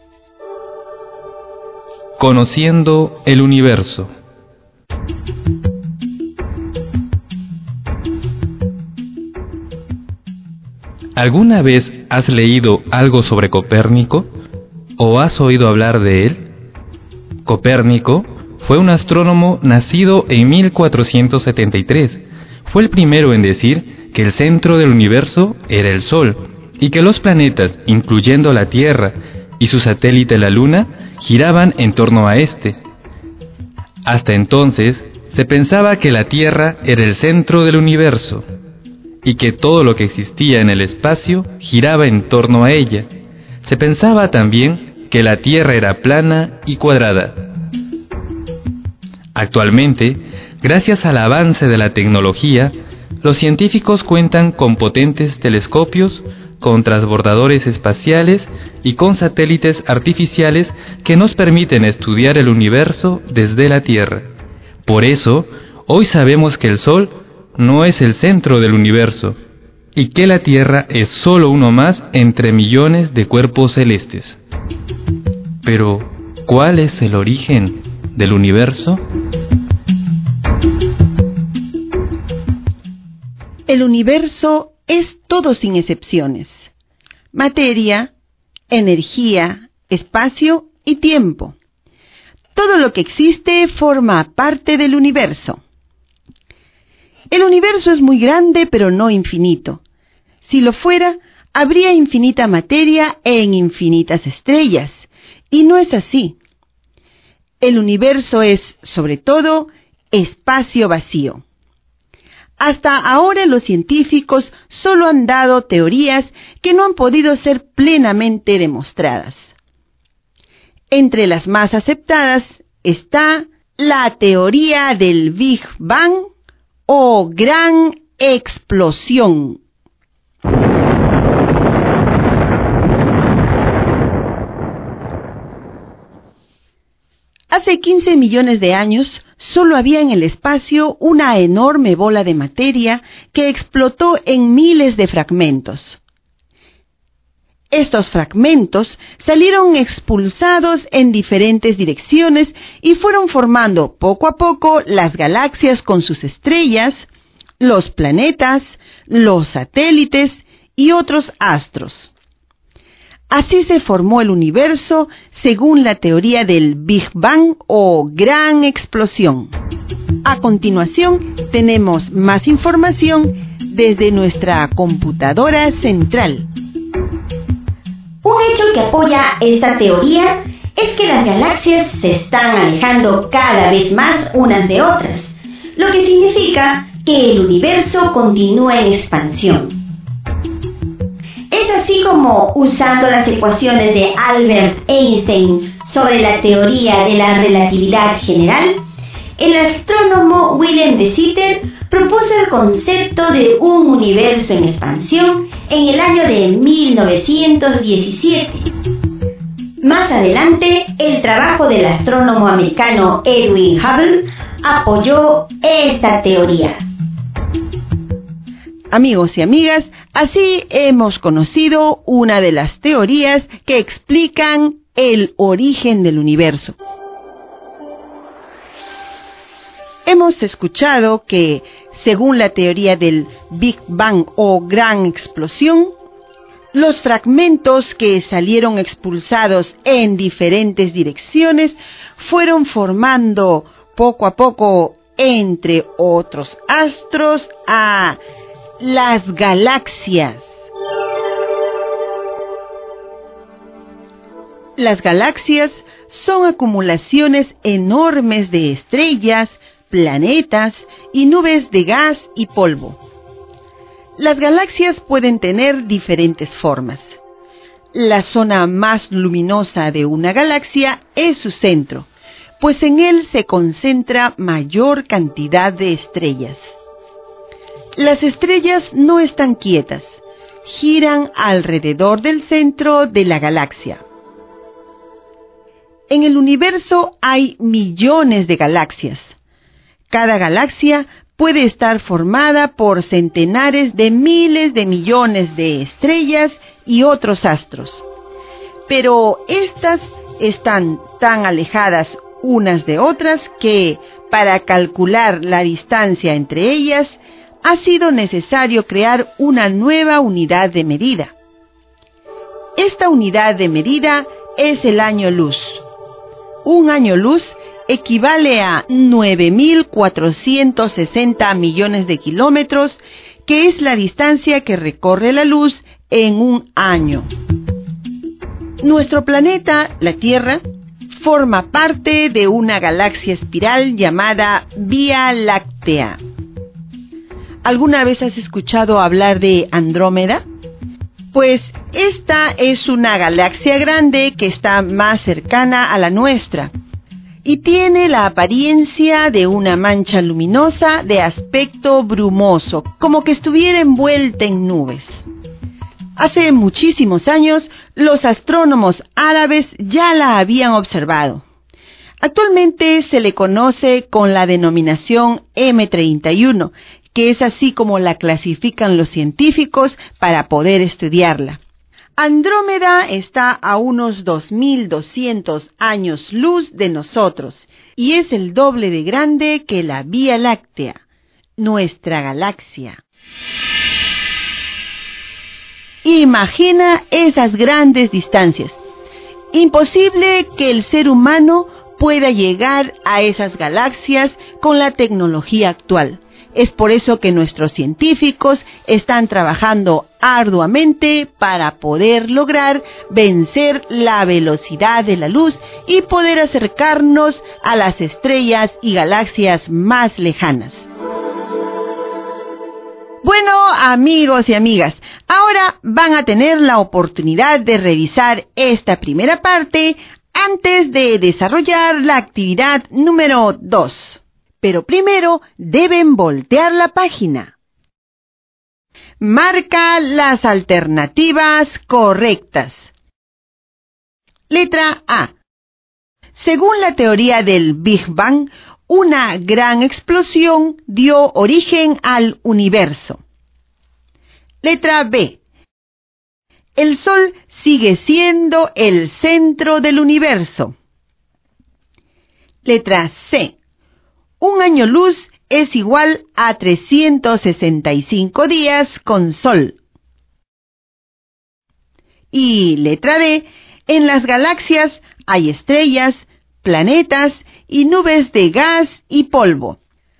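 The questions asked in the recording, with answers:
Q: Letra A. Según la teoría del Big Bang, una gran explosión dio origen al universo.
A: Correcta

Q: Letra B. El Sol sigue siendo el centro del universo.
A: Incorrecta

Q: Letra C. Un año luz es igual a 365 días con sol.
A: Incorrecta

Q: Y letra D, en las galaxias hay estrellas, planetas y nubes de gas y polvo.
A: Correcta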